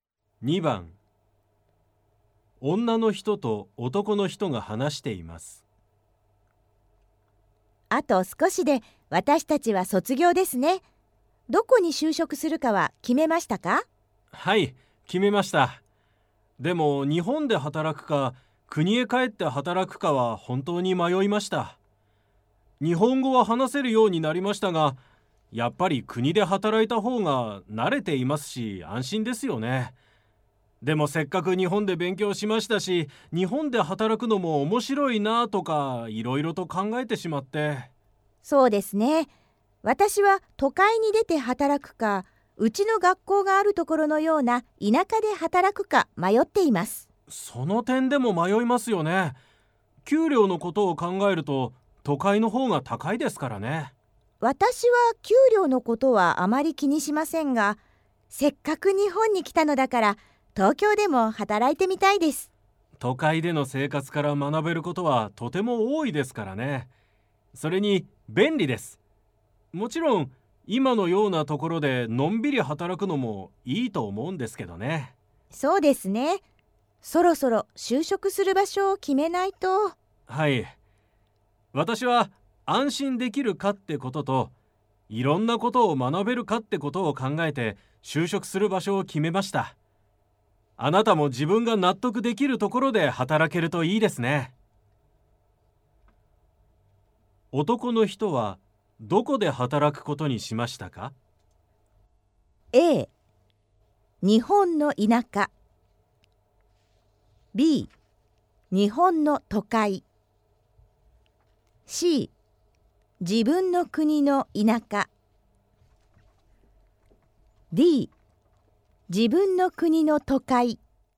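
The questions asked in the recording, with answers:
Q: 男の人はどこで働くことにしましたか?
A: D: 自分の国の都会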